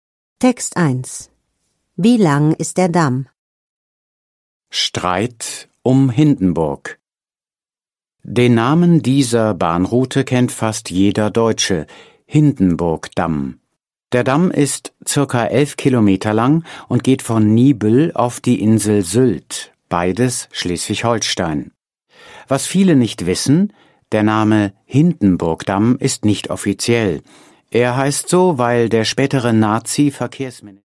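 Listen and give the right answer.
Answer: ca. 11 Kilometer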